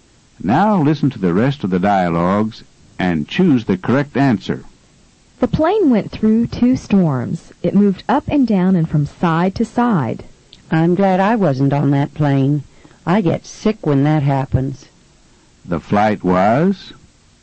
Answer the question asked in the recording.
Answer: The flight was rough.